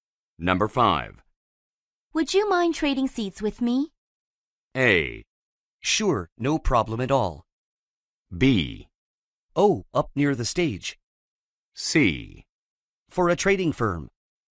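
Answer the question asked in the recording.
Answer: A: Sure, no problem at all.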